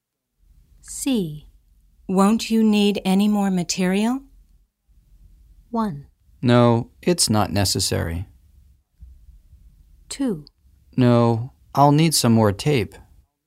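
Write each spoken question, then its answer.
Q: Won't you need any more material?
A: 1: No, it's not necessary.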